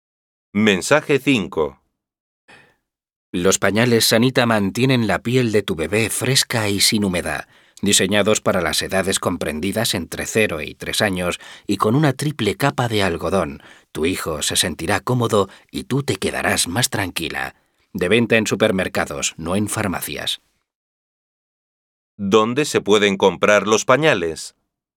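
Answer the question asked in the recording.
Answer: En supermercados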